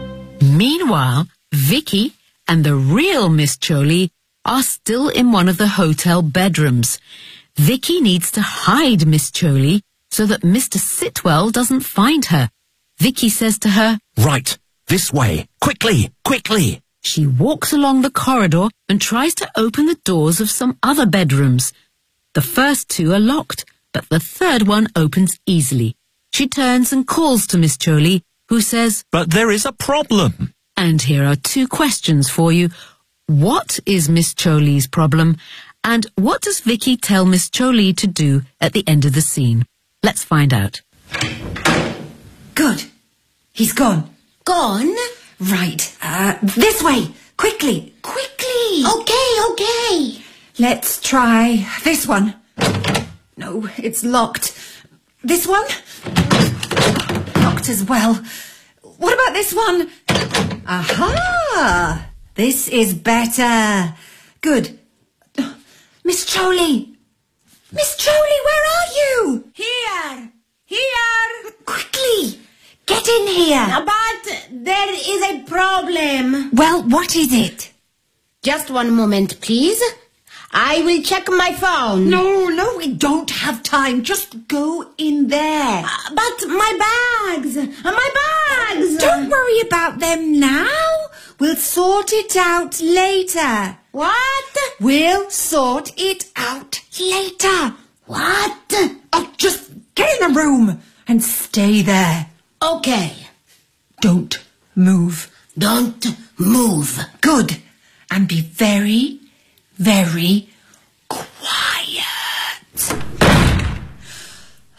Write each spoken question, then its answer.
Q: What is Miss Choli's problem?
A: But my bags! My bags!

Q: And what does Vicky tell Miss Choli to do at the end of the scene?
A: Don't move. And be very, very quiet.